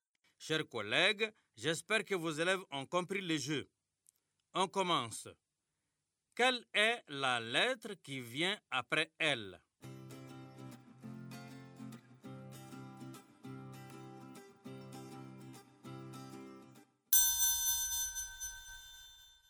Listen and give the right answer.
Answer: Monsieur, c'est M.